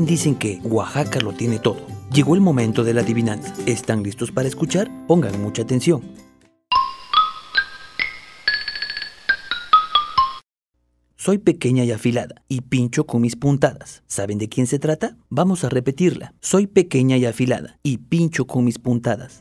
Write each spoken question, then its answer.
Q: ¿Saben de quién se trata?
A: La respuesta es la aguja.